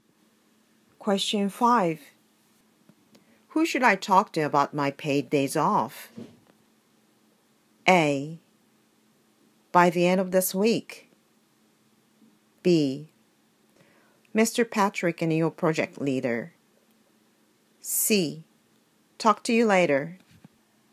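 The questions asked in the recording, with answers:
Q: Who should I talk to about my paid days off?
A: B: Mr. Patrick and your project leader.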